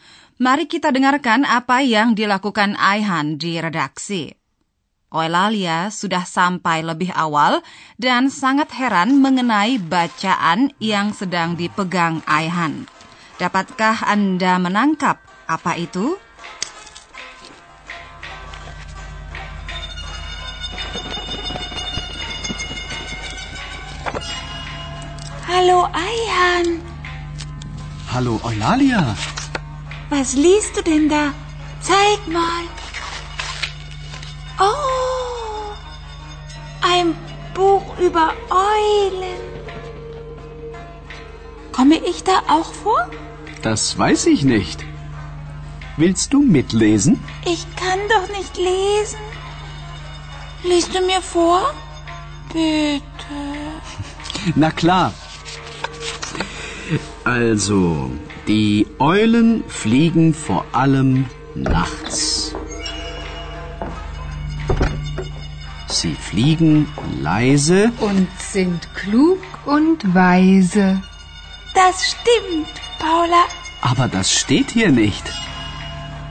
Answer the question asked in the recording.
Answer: Oh, ein Buch über Eulen. Buku itu berilustrasi foto-foto burung hantu.